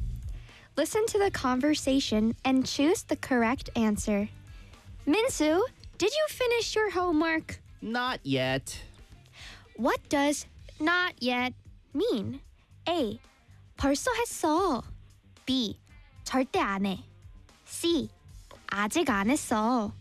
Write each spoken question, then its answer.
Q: What does not yet mean?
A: C. 아직 안 했어.